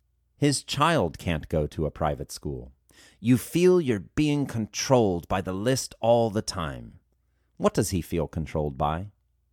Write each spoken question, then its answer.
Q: What does he feel controlled by?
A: He feels controlled by the list.